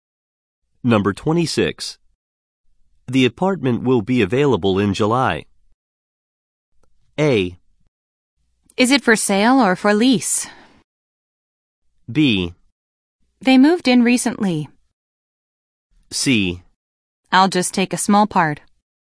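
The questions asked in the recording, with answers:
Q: The apartment will be available in July.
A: A: Is it for sale or for lease?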